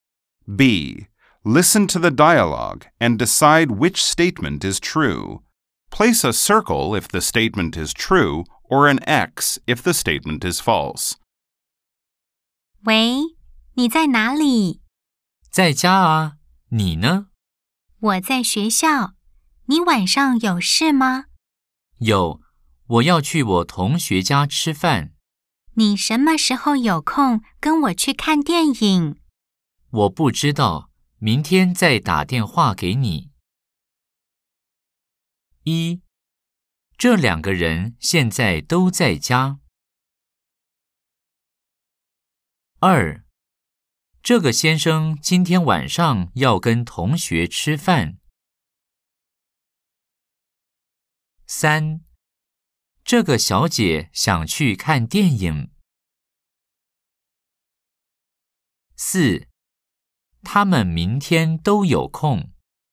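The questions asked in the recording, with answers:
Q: 这两个人现在都在家。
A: 错 (X)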